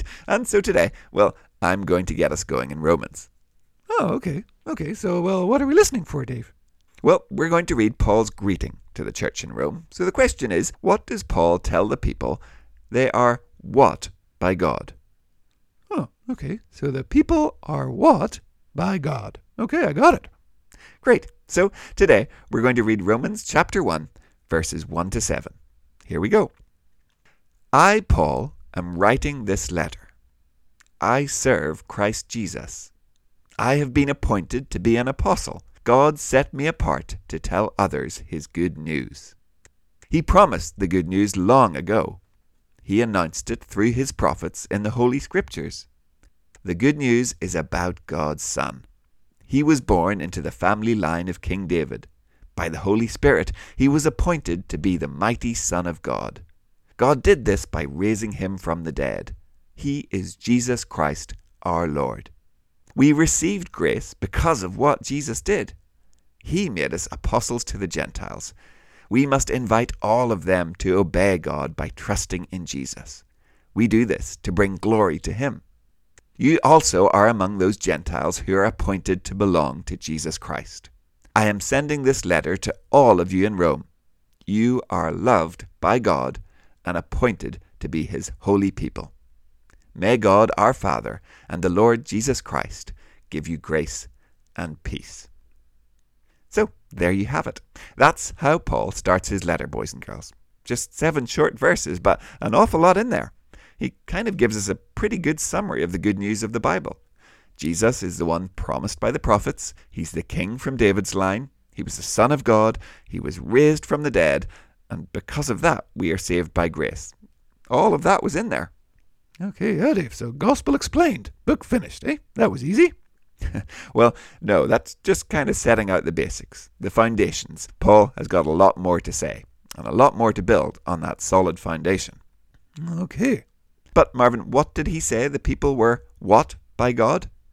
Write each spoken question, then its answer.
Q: what did he say the people were what by God?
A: They were loved by God.